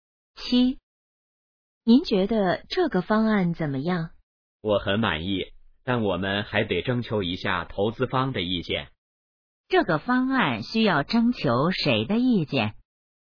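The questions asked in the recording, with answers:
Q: 这个方案需要征求谁的意见?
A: 投资方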